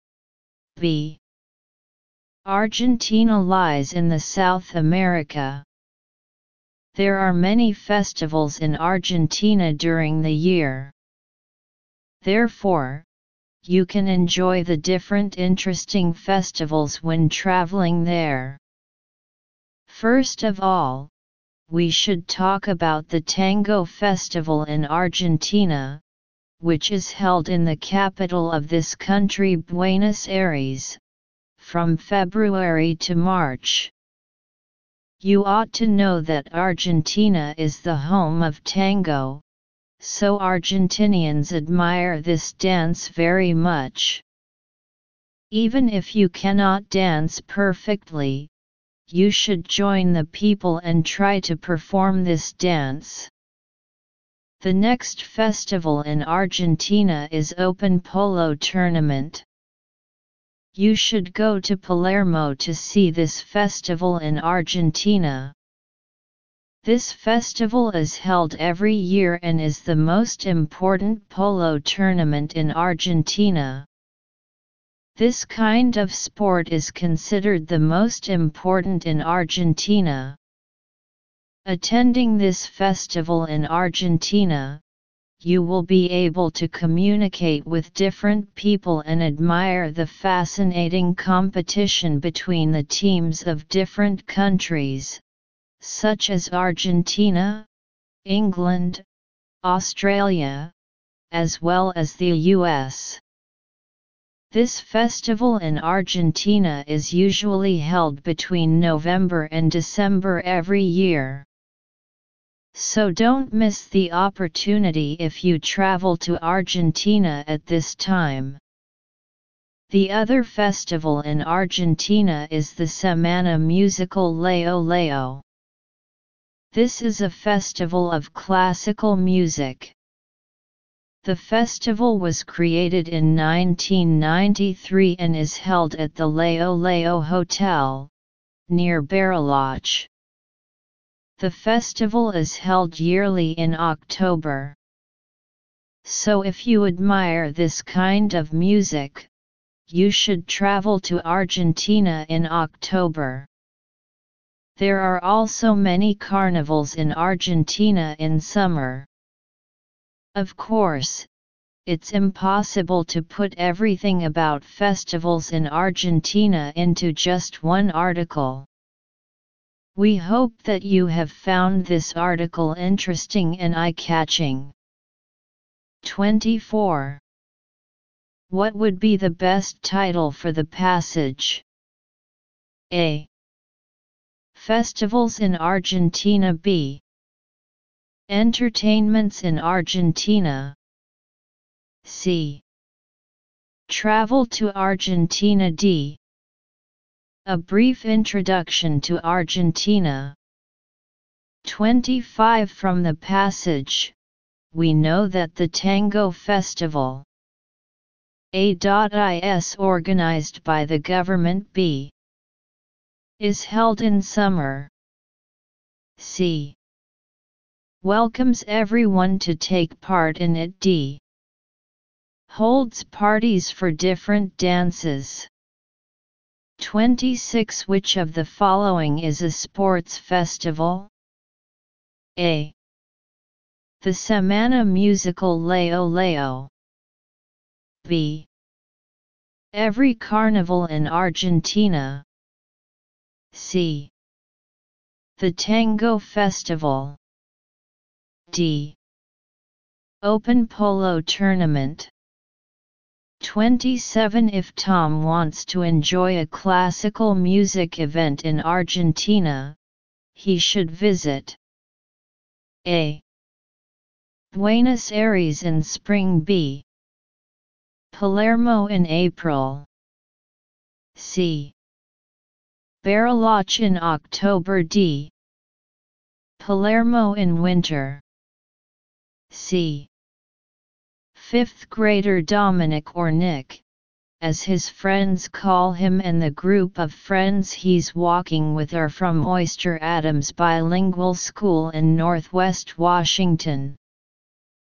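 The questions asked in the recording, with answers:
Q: What would be the best title for the passage?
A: A: Festivals in Argentina.

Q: From the passage, we know that the Tango Festival A.I.S.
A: C: Welcomes everyone to take part in it.

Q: Which of the following is a sports festival?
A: D: Open Polo Tournament.

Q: If Tom wants to enjoy a classical music event in Argentina, he should visit A.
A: C: Bariloche in October.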